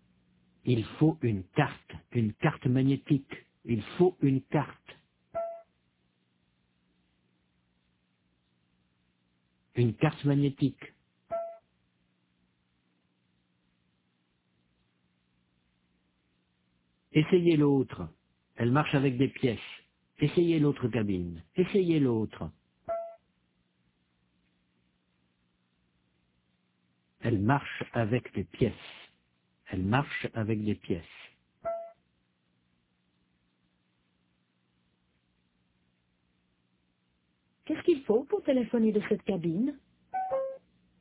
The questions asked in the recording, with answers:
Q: Qu'est-ce qu'il faut pour téléphoner de cette cabine ?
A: Une carte magnétique.